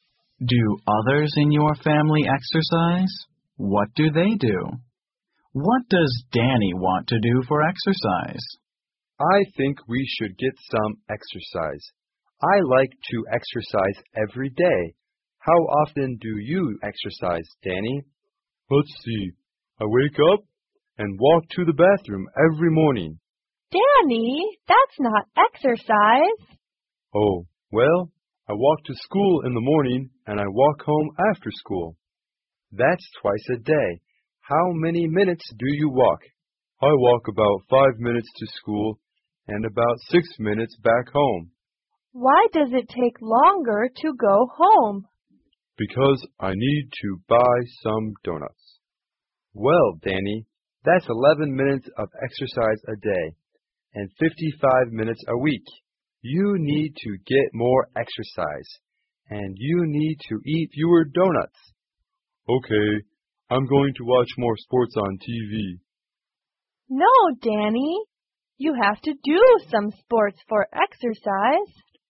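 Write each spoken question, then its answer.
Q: What does Danny want to do for exercise?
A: He wants to watch more sports on TV.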